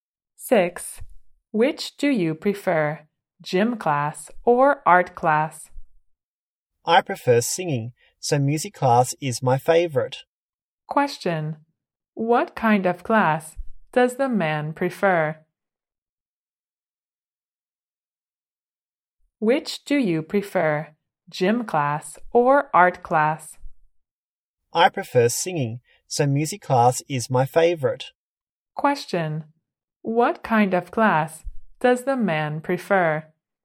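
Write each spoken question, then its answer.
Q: What kind of class does the man prefer?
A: Music class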